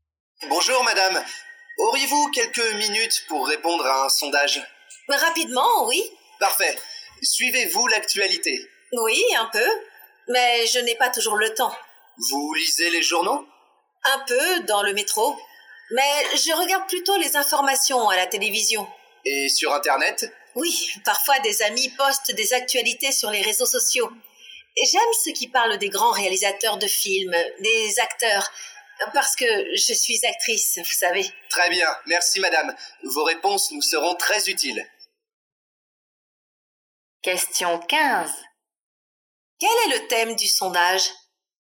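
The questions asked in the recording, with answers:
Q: Quel est le thème du sondage ?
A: L'actualité / la façon de s'informer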